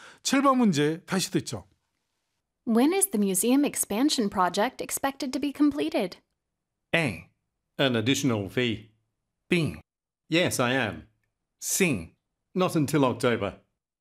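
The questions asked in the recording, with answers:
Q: When is the museum expansion project expected to be completed?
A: C: Not until October.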